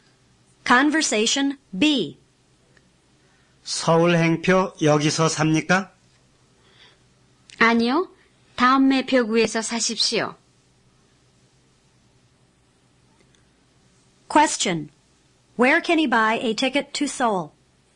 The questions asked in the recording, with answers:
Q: Where can he buy a ticket to Seoul?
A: He can buy it at the next window.